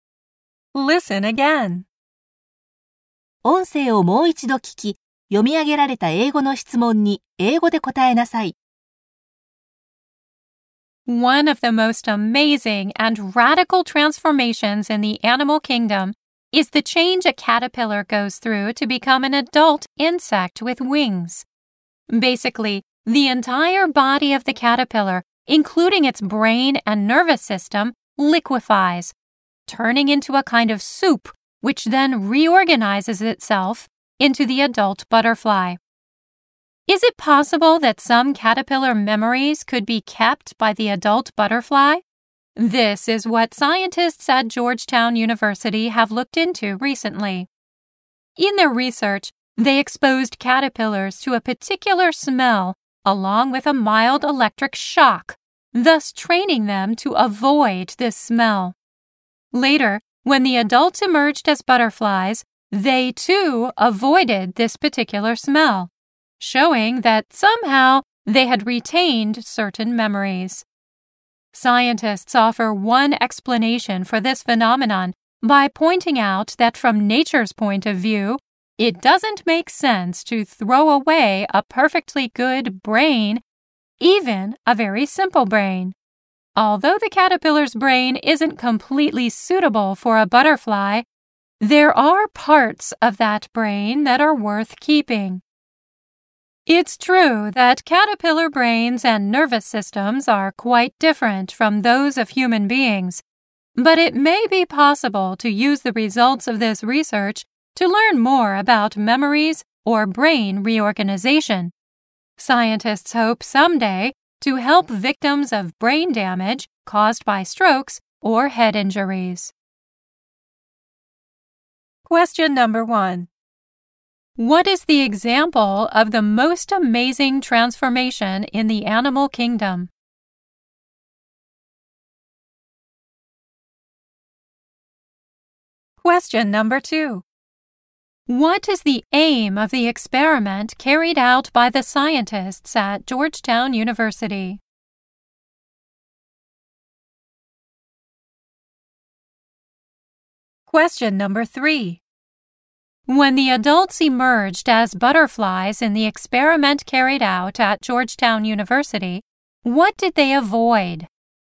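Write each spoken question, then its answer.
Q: What is the example of the most amazing transformation in the animal kingdom?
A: The change a caterpillar goes through to become an adult insect with wings (a butterfly).

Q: What is the aim of the experiment carried out by the scientists at Georgetown University?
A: To find out whether an adult butterfly could keep some of its caterpillar memories.

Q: When the adults emerged as butterflies in the experiment carried out at Georgetown University, what did they avoid?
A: The particular smell they had been trained to avoid as caterpillars.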